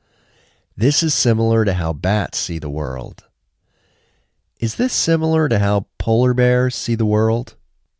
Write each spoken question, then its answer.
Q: Is this similar to how polar bears see the world?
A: No, this isn't similar to how polar bears see the world.